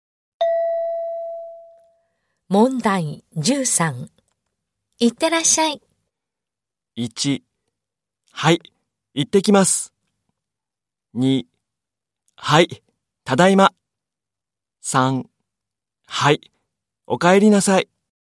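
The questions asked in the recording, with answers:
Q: いってらっしゃい。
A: 2: はい、行ってきます。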